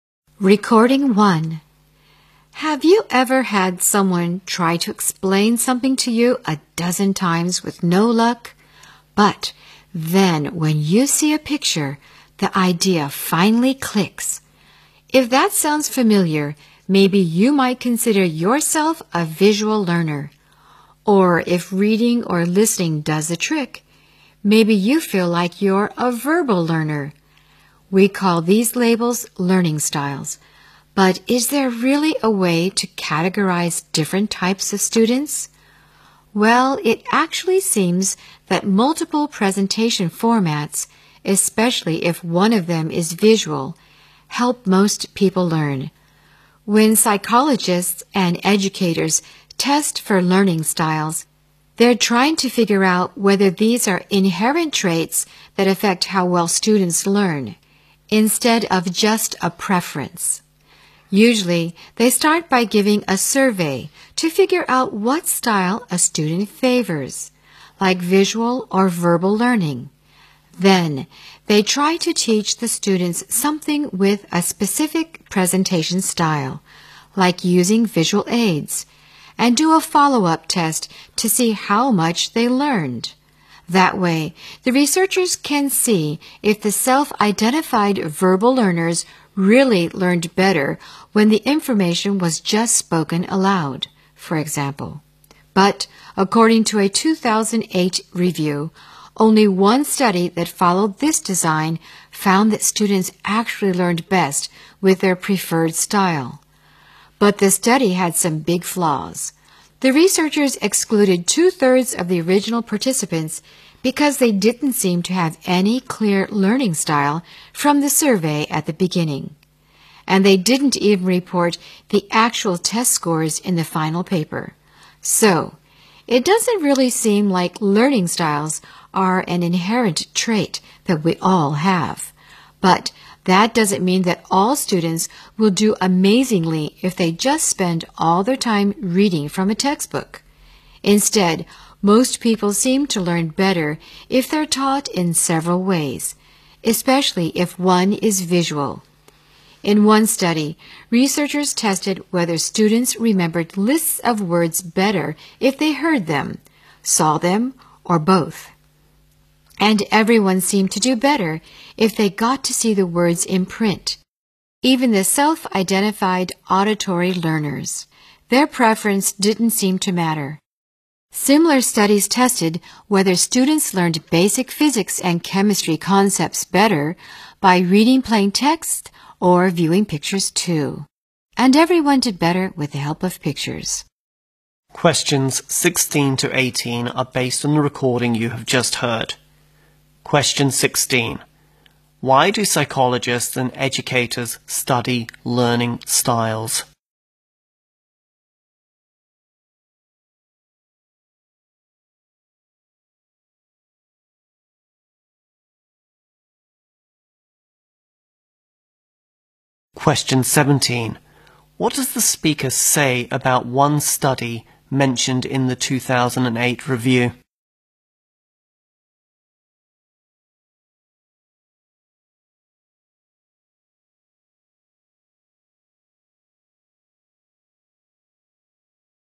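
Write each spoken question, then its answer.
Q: Why do psychologists and educators study learning styles?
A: To find out whether learning styles are inherent traits that affect how well students learn.

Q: What does the speaker say about one study mentioned in the 2008 review?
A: It had some big flaws.

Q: What message does the speaker want to convey about learning at the end of the talk?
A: People learn better when taught in several ways, especially with visuals.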